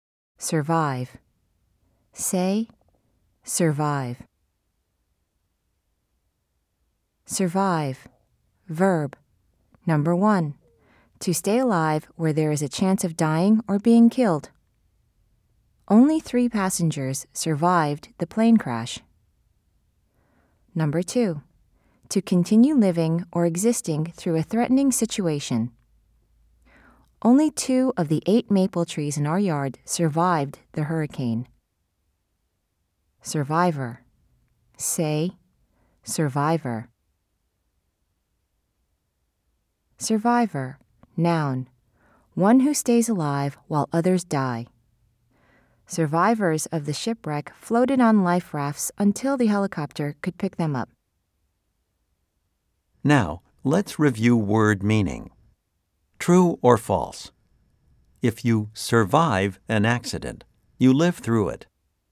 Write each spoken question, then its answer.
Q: True or false? If you survive an accident, you live through it.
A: If you said true, you are correct.